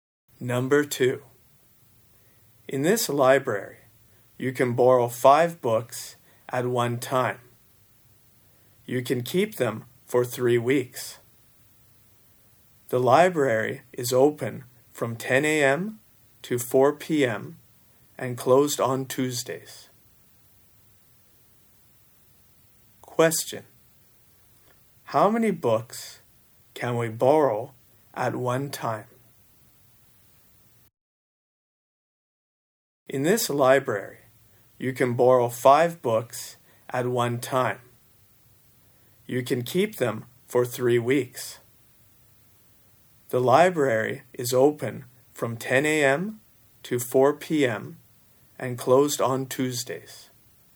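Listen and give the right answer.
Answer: Five books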